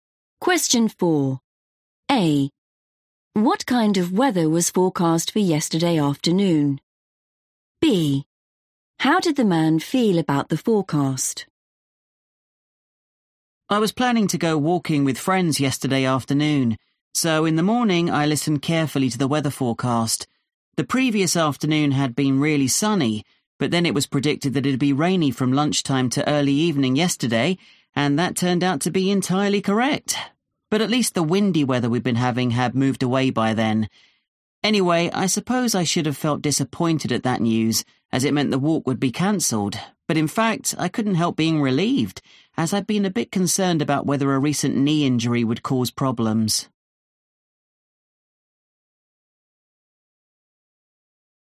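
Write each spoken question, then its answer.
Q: What kind of weather was forecast for yesterday afternoon?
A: rainy

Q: How did the man feel about the forecast?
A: relieved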